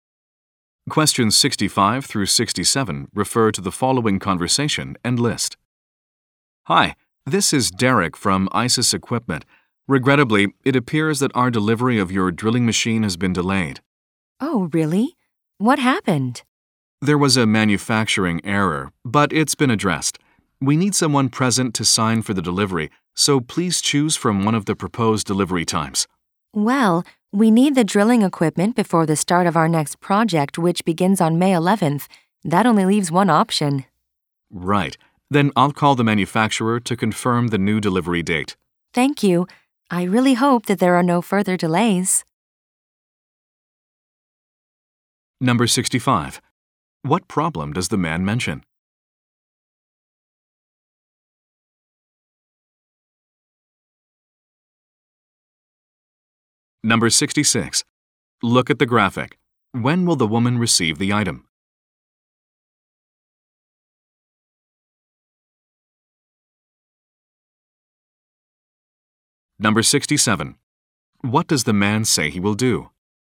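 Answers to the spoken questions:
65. The delivery has been delayed
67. Call the manufacturer to confirm the delivery date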